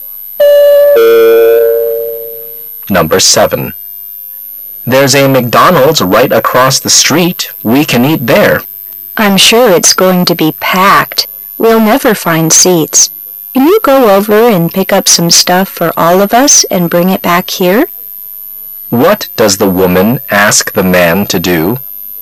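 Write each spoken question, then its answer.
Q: What does the woman ask the man to do?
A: Go to McDonald's and bring back food for everyone

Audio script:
[解析] M: There's a McDonald's right across the street. We can eat there. W: I'm sure it's going to be packed. We'll never find seats. Can you go over and pick up some stuff for all of us and bring it back here? Q: What does the woman ask the man to do?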